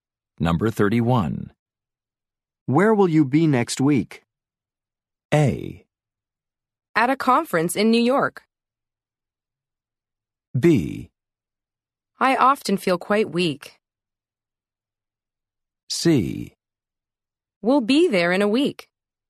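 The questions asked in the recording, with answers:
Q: Where will you be next week?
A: A: At a conference in New York.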